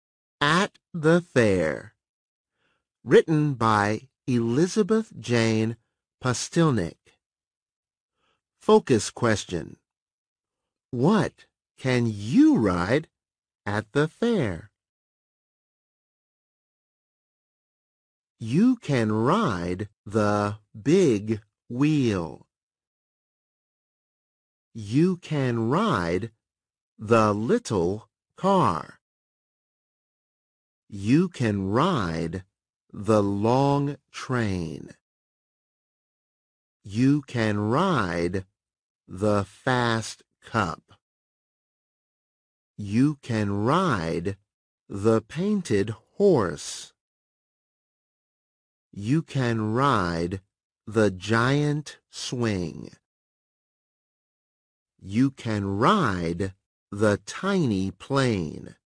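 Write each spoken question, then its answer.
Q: What can you ride at the fair?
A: The big wheel, little car, long train, fast cup, painted horse, giant swing and tiny plane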